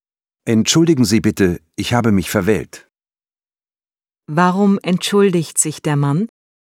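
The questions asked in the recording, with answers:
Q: Warum entschuldigt sich der Mann?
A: Er hat sich verwählt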